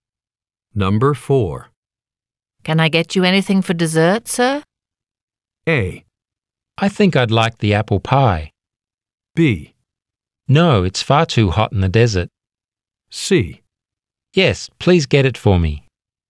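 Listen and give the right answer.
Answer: A: I think I'd like the apple pie.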